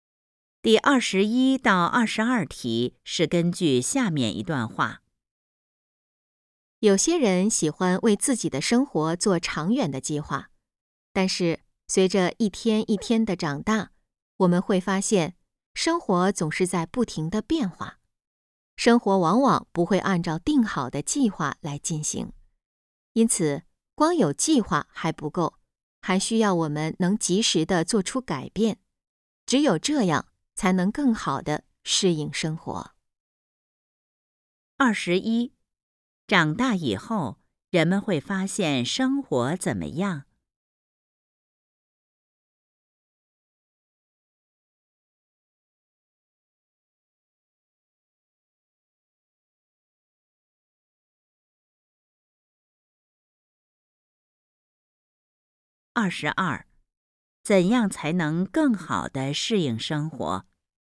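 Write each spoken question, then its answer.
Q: 长大以后,人们会发现生活怎么样?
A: 总是在不停地变化

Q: 怎样才能更好地适应生活?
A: 及时做出改变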